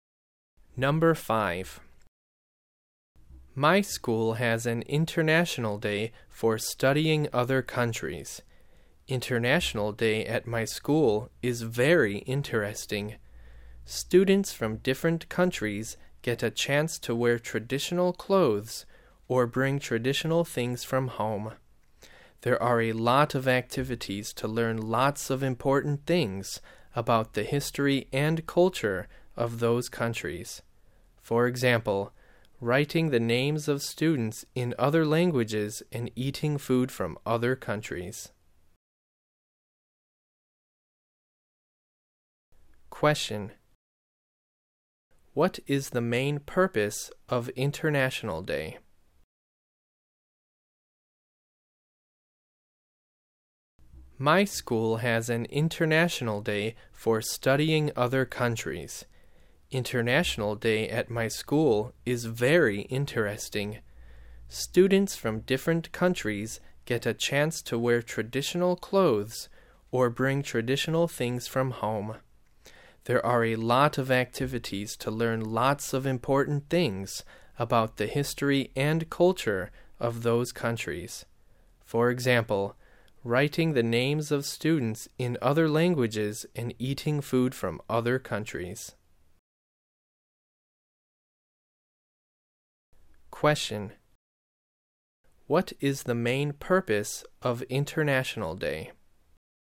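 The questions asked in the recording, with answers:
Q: What is the main purpose of International Day?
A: To study other countries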